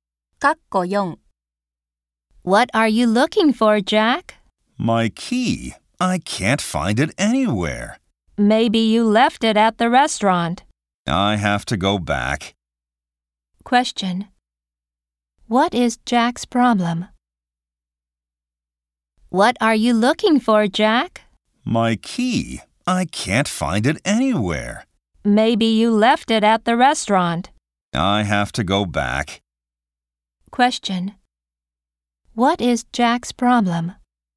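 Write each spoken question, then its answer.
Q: What is Jack's problem?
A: He can't find his key.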